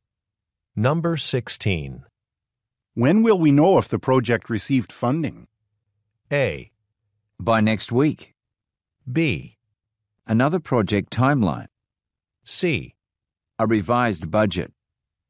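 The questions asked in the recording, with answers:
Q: When will we know if the project received funding?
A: A: By next week.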